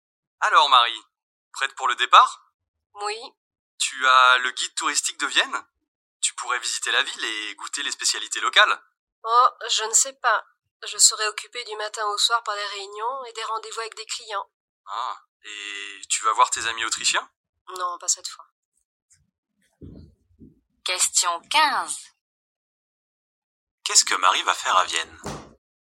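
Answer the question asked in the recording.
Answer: Travailler : réunions et rendez-vous avec des clients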